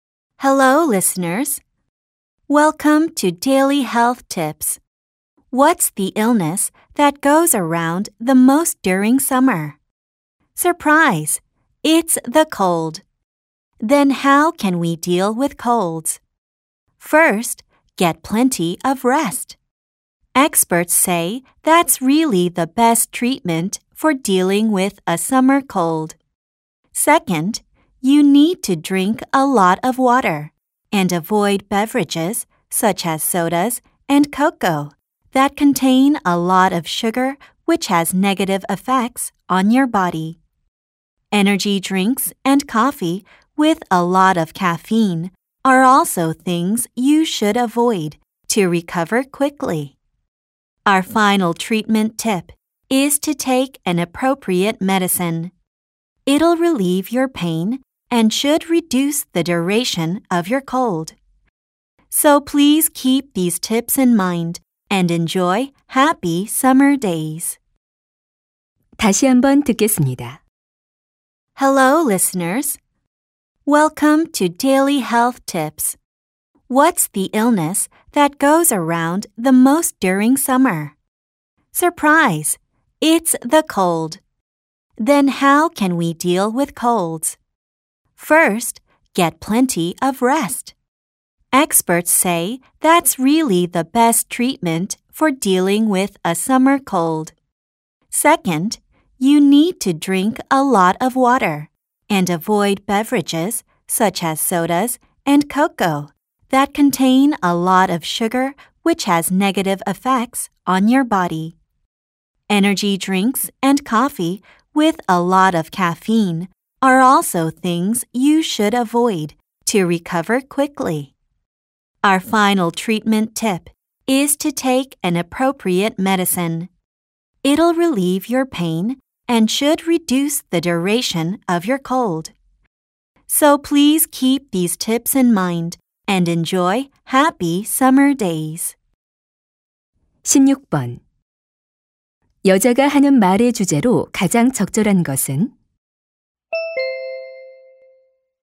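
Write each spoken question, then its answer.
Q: 여자가 하는 말의 주제로 가장 적절한 것은?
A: 여름 감기를 치료하는 방법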